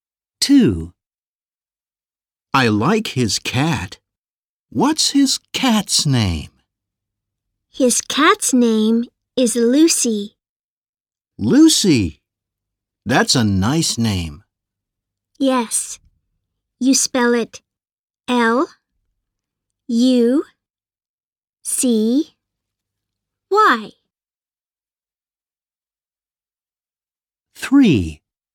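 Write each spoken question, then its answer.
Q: I like his cat. What's his cat's name?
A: Lucy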